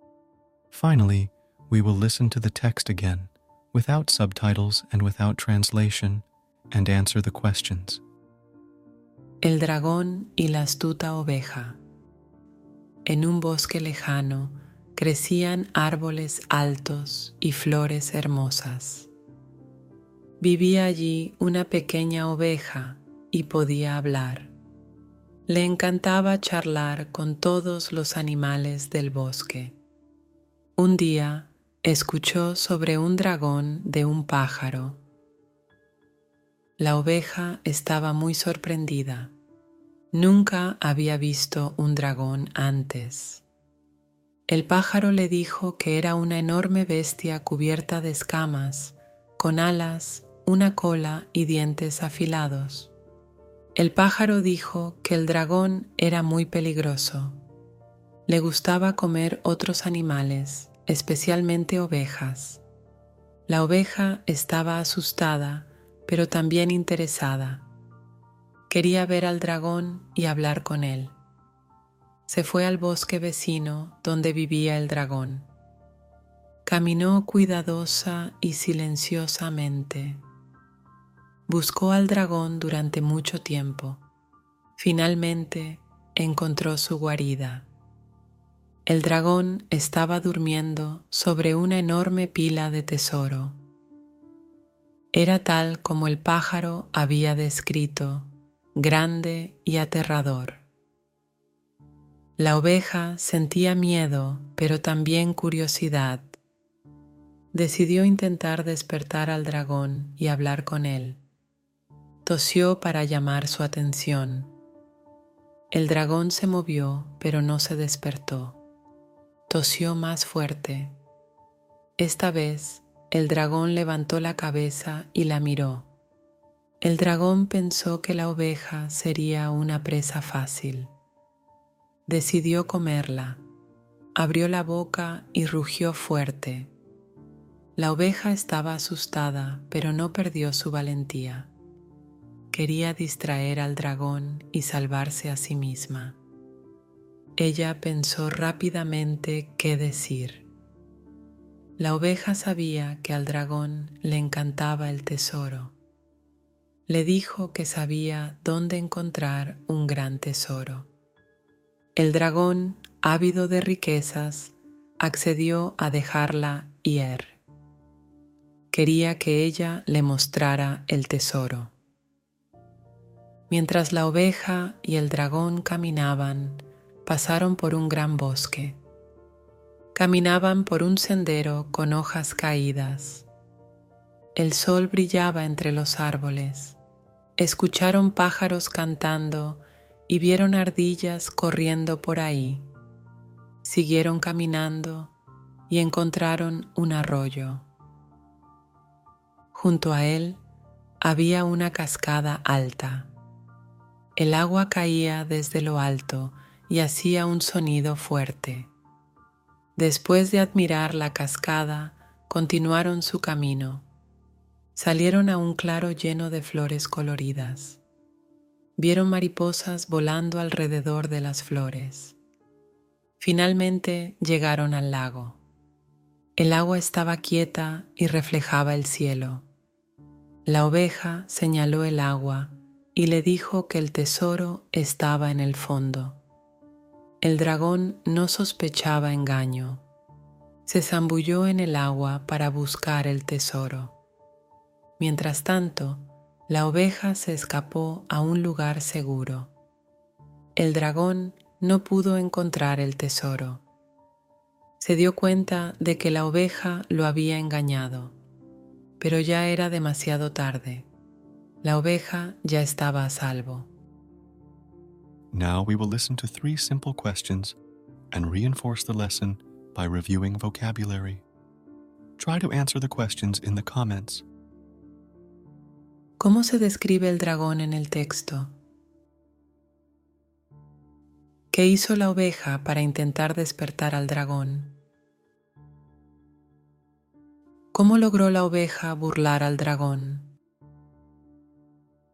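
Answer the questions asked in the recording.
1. Como una enorme bestia cubierta de escamas, con alas, una cola y dientes afilados; grande, aterrador y muy peligroso
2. Tosió, y luego tosió más fuerte
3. Le dijo que el tesoro estaba en el fondo del lago; mientras el dragón se zambullía, ella se escapó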